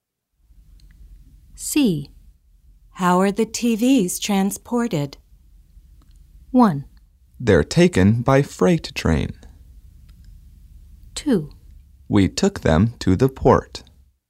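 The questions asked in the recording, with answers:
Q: How are the TVs transported?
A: 1: They're taken by freight train.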